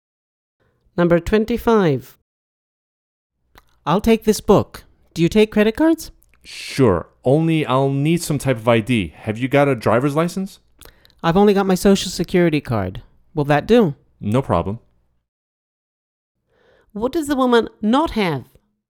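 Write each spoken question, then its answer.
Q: What does the woman not have?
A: a driver's license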